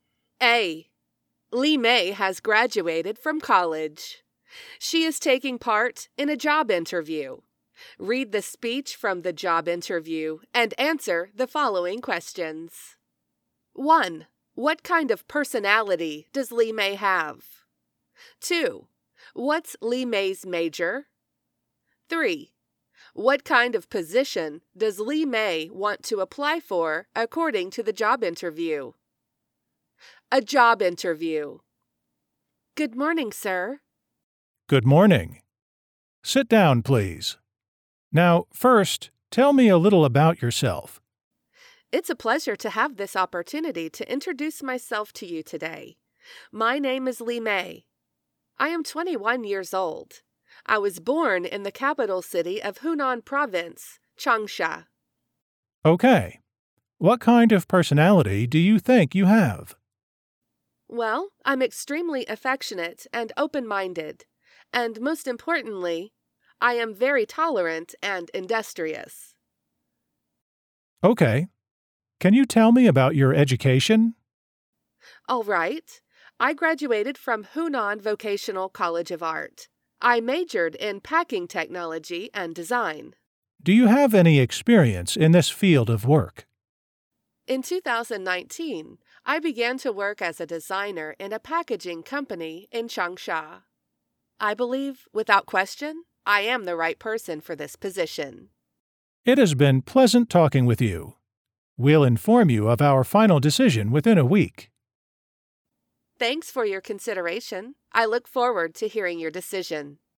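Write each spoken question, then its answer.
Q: What kind of personality does Li Mei have?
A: Affectionate, open-minded, tolerant and industrious

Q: What's Li Mei's major?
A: Packing technology and design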